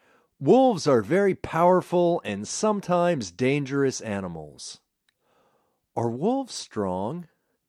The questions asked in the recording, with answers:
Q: Are wolves strong?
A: Yes, they are powerful.